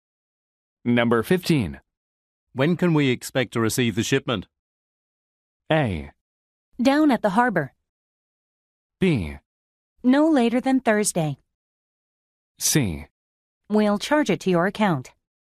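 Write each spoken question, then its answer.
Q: When can we expect to receive the shipment?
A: B: No later than Thursday.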